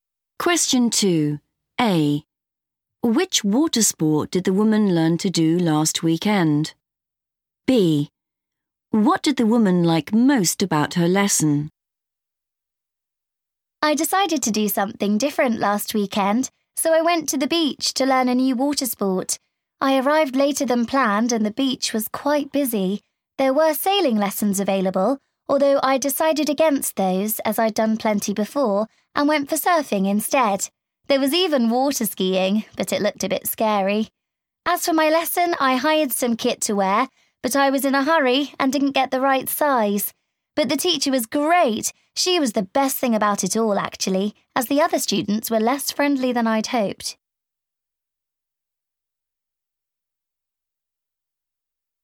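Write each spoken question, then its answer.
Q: Which water sport did the woman learn to do last weekend?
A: surfing

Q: What did the woman like most about her lesson?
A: the teacher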